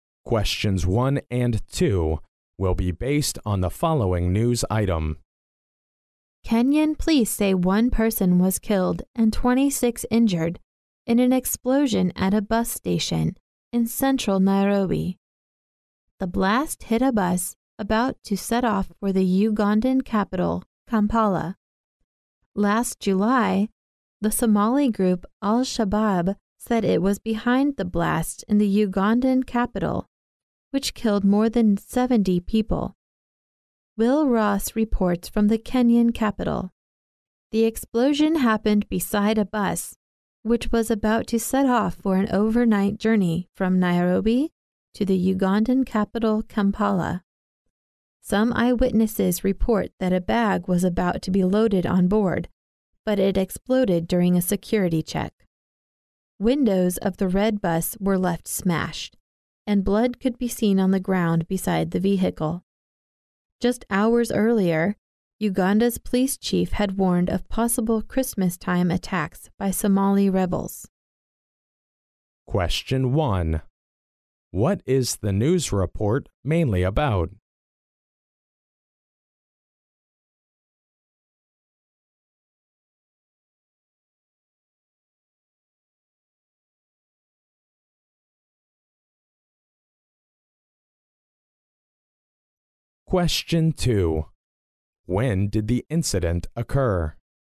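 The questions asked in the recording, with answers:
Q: What is the news report mainly about?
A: A bus explosion at a bus station in central Nairobi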